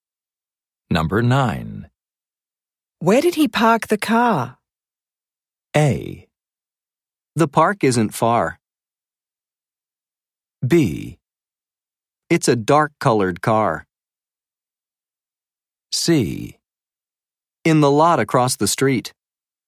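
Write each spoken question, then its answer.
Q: Where did he park the car?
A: C: In the lot across the street.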